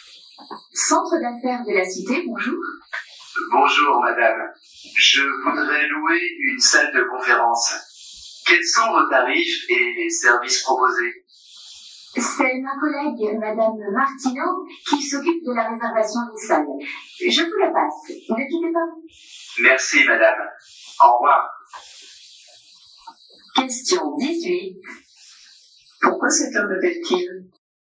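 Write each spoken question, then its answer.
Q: Pourquoi cet homme m'appelle-t-il?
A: Pour louer une salle de conférence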